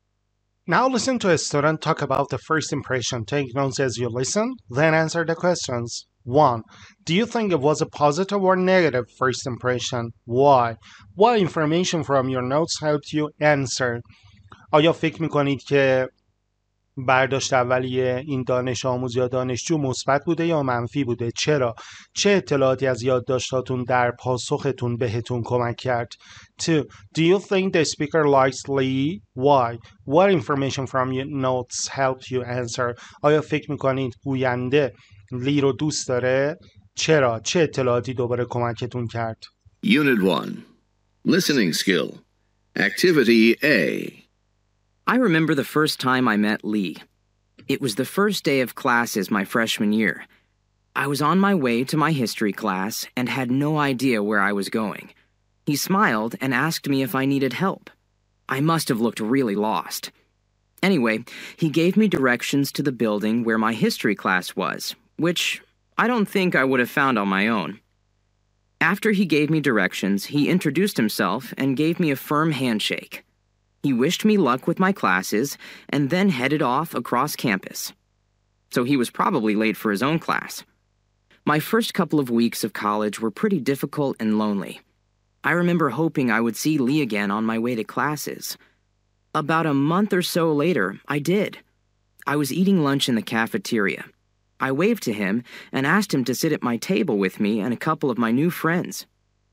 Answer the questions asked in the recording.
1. It was a positive first impression.
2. Yes, the speaker likes Lee, having looked forward to seeing him again and inviting him to sit and have lunch together.